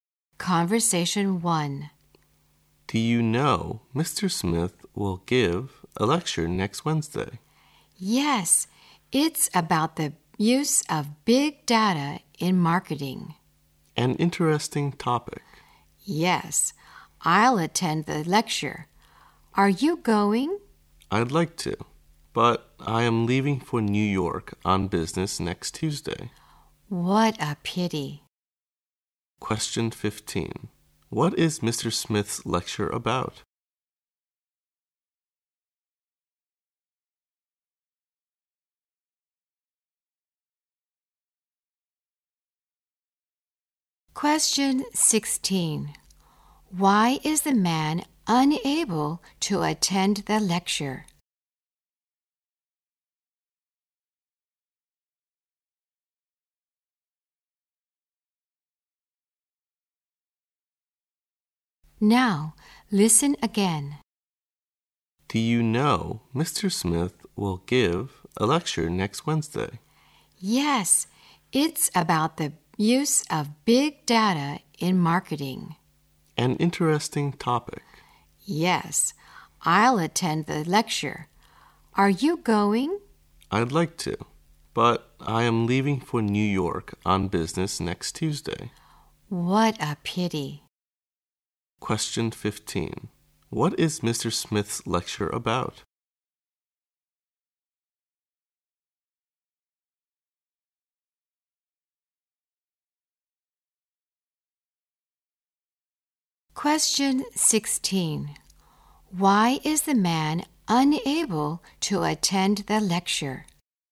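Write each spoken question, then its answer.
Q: What is Mr. Smith's lecture about?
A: The use of big data in marketing

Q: Why is the man unable to attend the lecture?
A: He is leaving for New York on business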